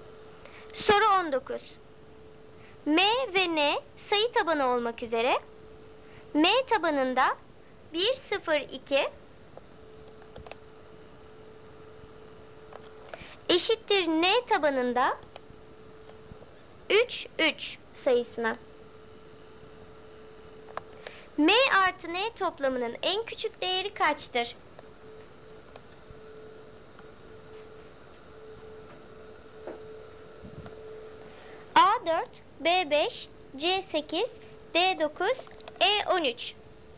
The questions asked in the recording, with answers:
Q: M artı N toplamının en küçük değeri kaçtır?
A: Doğru cevap D 9.